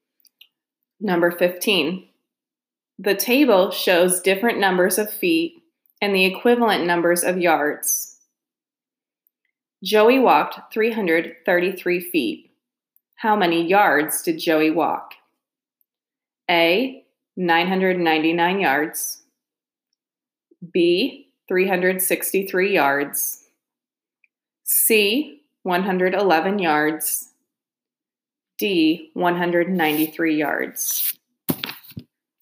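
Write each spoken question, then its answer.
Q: Joey walked 333 feet. How many yards did Joey walk?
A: C: 111 yards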